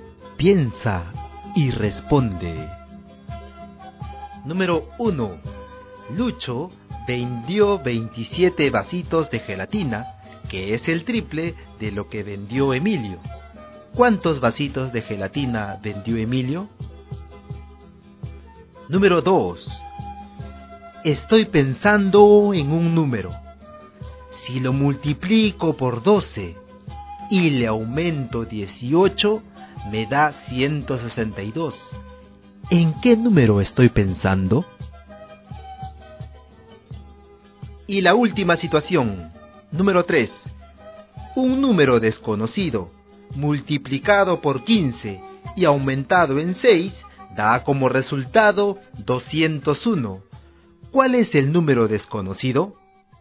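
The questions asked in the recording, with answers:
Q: ¿En qué número estoy pensando?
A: 12

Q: ¿Cuál es el número desconocido?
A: 13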